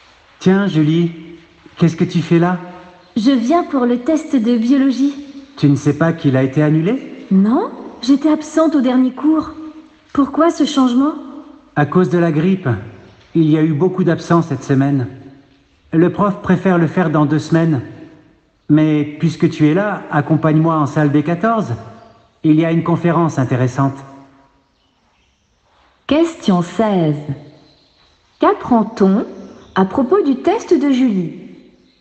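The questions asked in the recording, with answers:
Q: Qu'apprend-on à propos du test de Julie?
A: Il a été annulé et reporté à dans 2 semaines à cause de la grippe.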